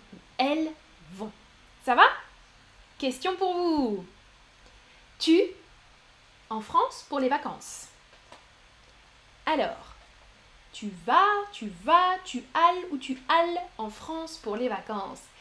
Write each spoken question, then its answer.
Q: Tu en France pour les vacances.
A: La bonne conjugaison du verbe aller avec tu, c'est tu vas bien sûr avec un S.